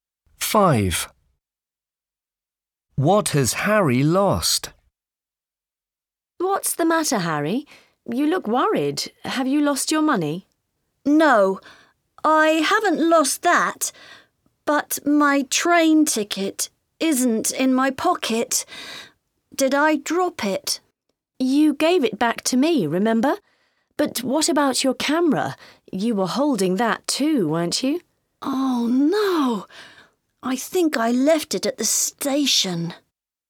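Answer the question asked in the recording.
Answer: his camera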